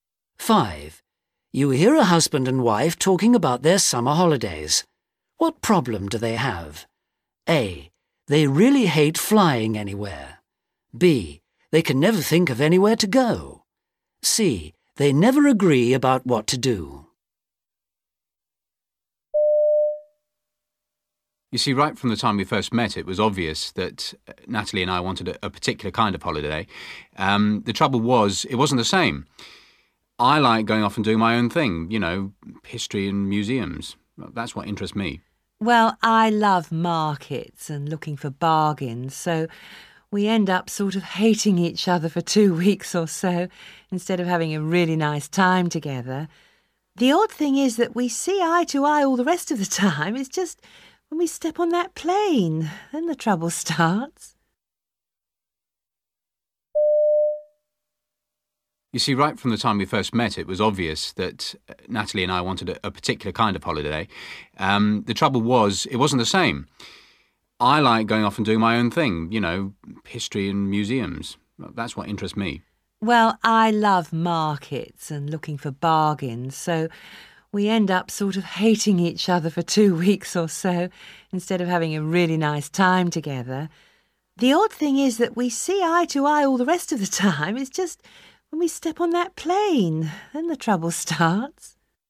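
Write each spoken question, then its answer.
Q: What problem do they have?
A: C: They never agree about what to do.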